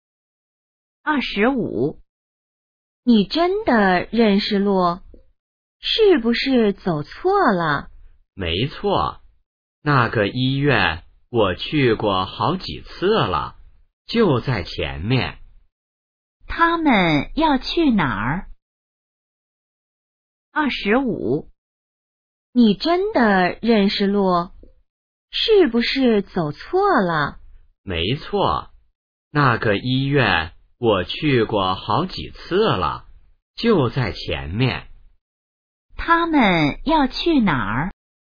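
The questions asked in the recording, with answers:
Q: 他们要去哪儿?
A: 医院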